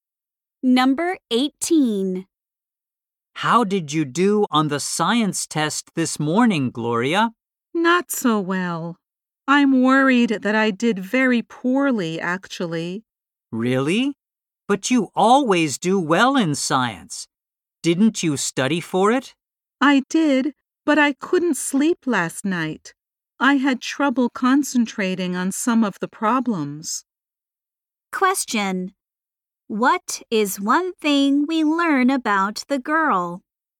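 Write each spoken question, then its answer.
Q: What is one thing we learn about the girl?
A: She couldn't sleep the night before the test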